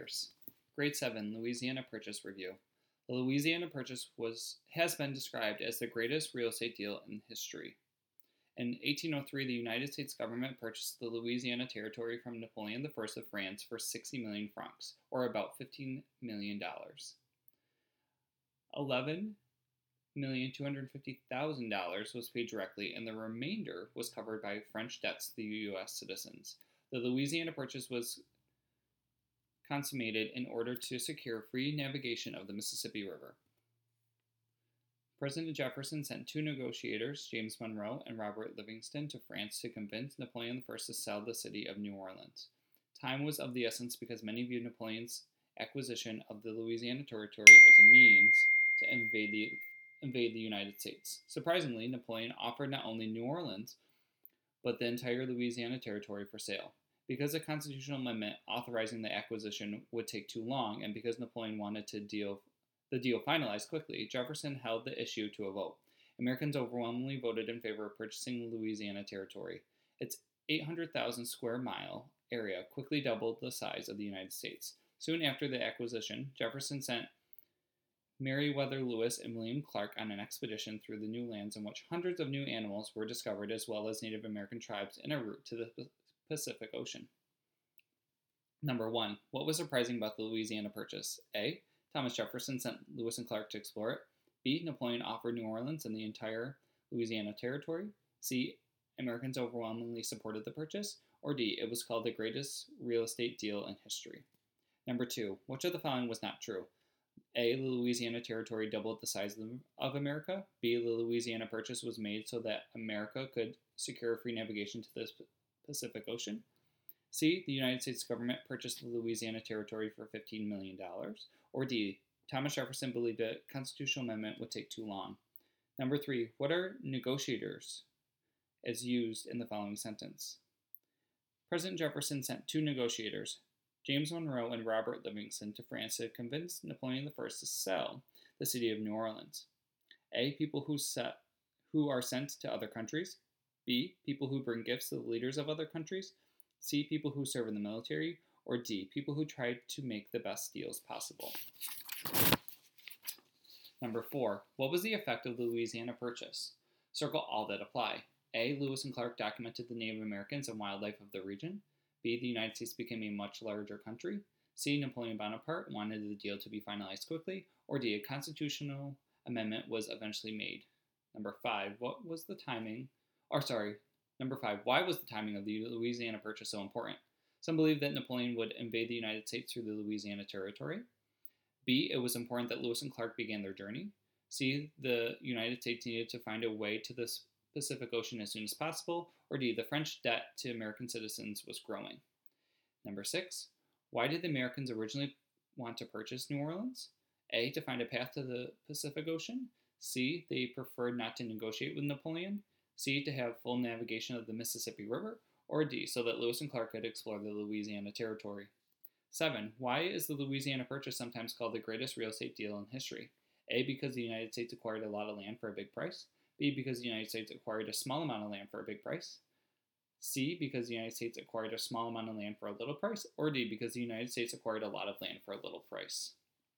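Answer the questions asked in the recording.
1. B: Napoleon offered New Orleans and the entire Louisiana Territory.
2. B: The Louisiana Purchase was made so that America could secure free navigation to the Pacific Ocean.
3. D: People who try to make the best deals possible.
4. A and B: Lewis and Clark documented the Native Americans and wildlife of the region; The United States became a much larger country.
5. A: Some believe that Napoleon would invade the United States through the Louisiana Territory.
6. C: To have full navigation of the Mississippi River.
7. D: Because the United States acquired a lot of land for a little price.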